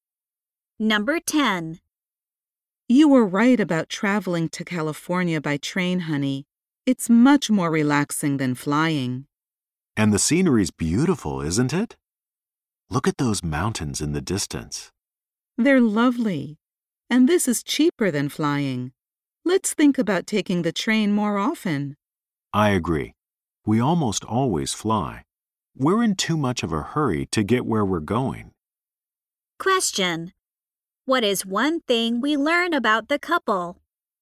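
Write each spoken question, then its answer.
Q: What is one thing we learn about the couple?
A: They usually travel by plane.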